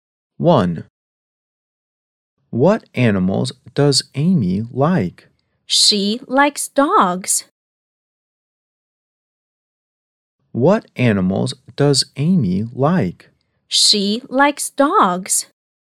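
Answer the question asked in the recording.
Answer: Dogs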